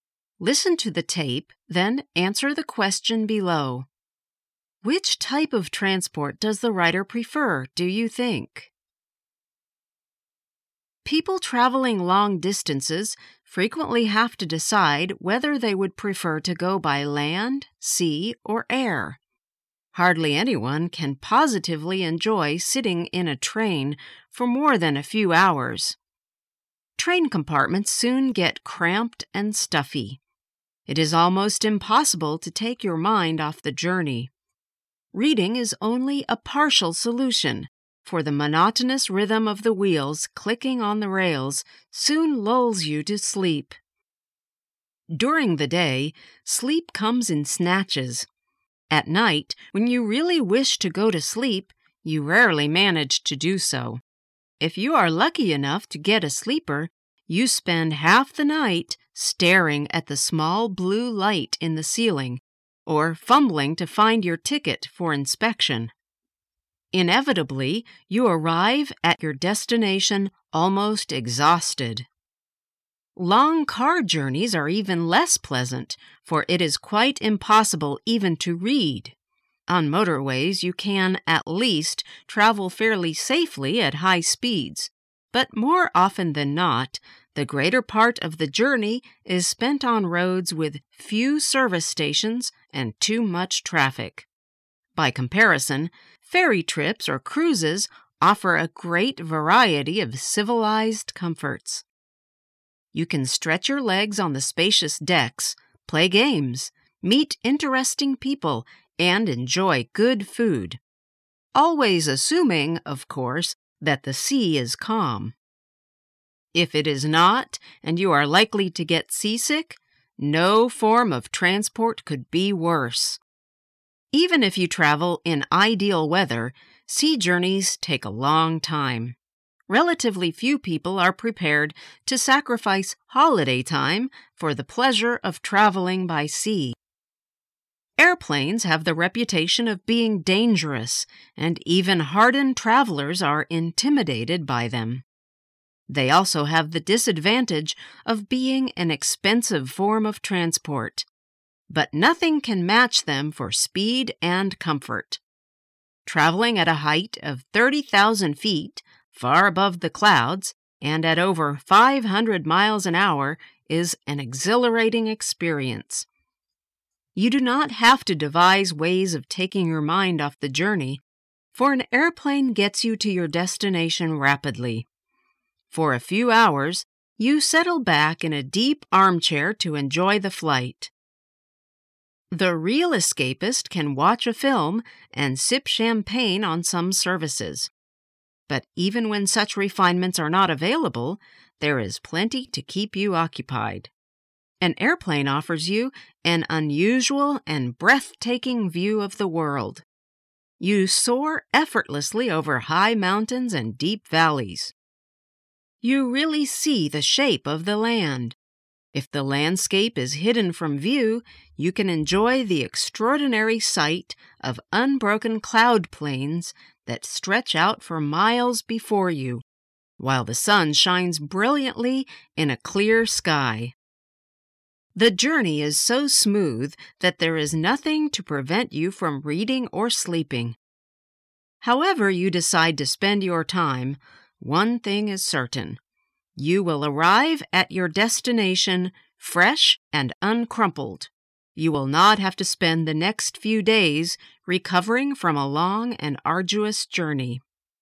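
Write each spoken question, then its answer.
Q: Which type of transport does the rider prefer, do you think?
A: Air travel (airplanes)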